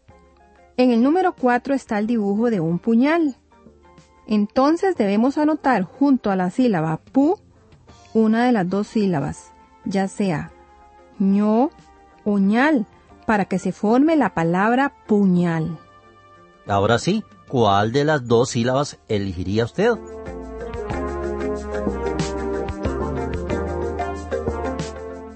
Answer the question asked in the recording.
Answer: Por supuesto que, para que se lea la palabra puñal, se debe anotar junto a la sílaba pu, la sílaba ñal.